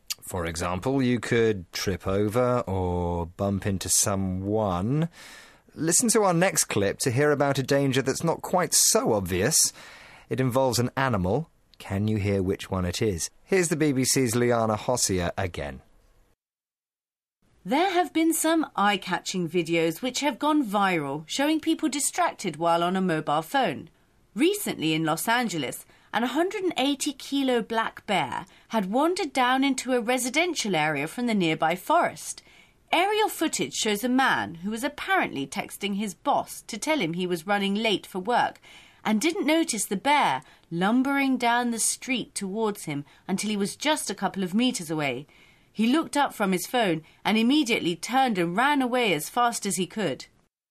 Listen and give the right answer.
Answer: But he didn't see a bear lumbering down the street towards him.